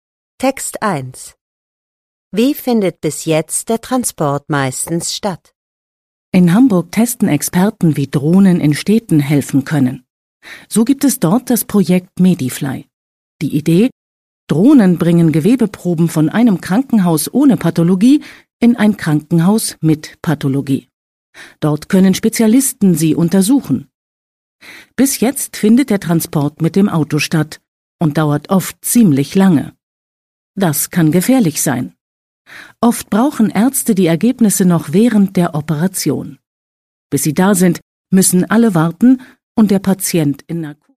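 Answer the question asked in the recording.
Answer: Mit dem Auto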